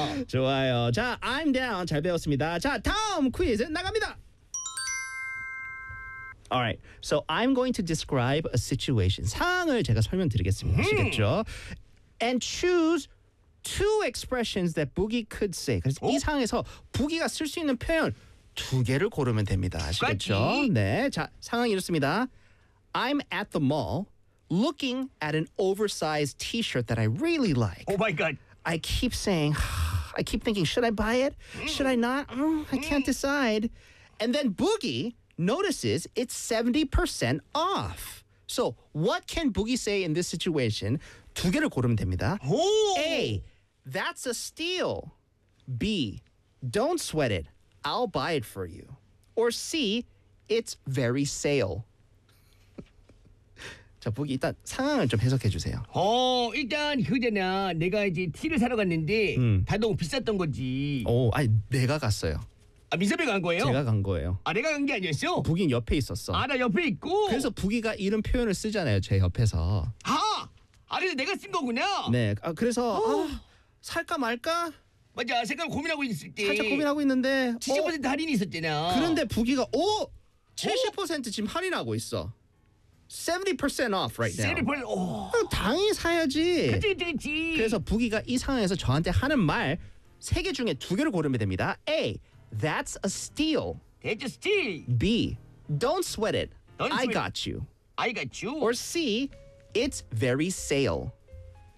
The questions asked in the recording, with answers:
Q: So what can Boogie say in this situation?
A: 그래서 부기가 이 상황에서 할 수 있는 말 두 가지가 A.